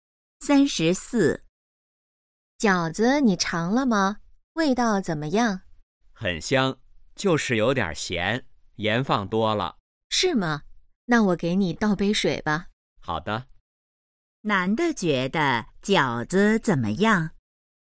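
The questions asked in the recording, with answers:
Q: 男的觉得饺子怎么样?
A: 有点咸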